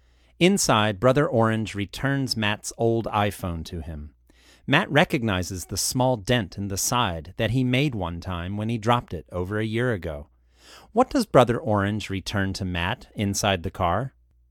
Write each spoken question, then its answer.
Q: What does Brother Orange return to Matt inside the car?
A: He returns Matt's old iPhone.